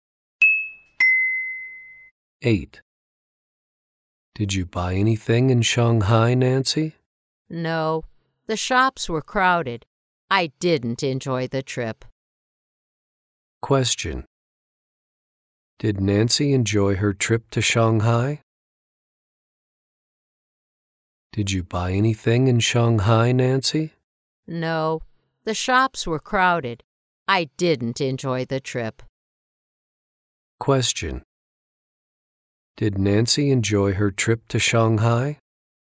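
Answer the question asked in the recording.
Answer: No, she didn't.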